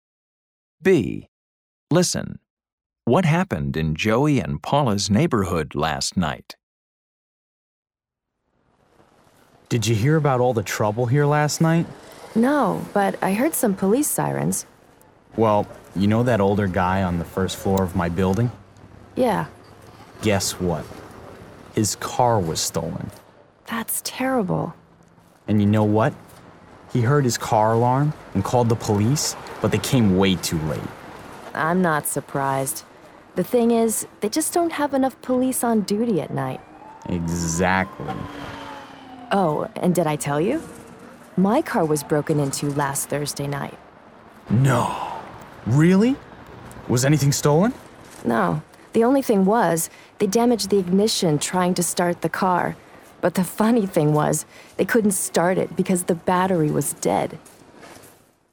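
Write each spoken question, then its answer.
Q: What happened in Joey and Paula's neighborhood last night?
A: A neighbor's car was stolen.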